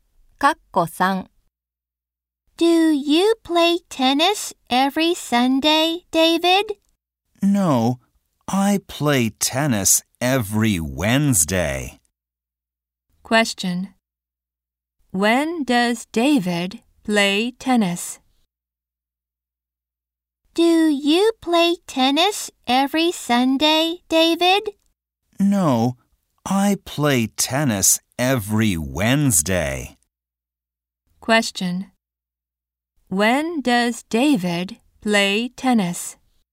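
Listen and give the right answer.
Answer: Every Wednesday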